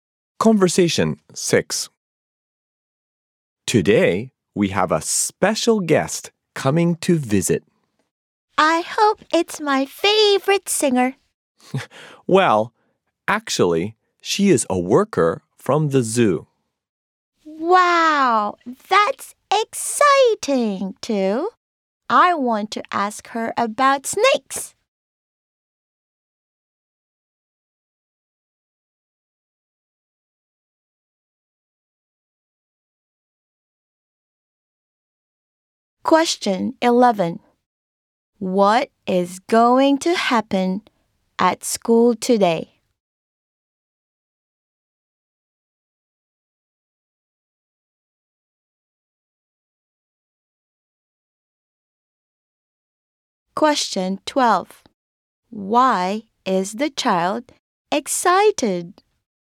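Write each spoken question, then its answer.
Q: What is going to happen at school today?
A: A worker from the zoo is coming to visit.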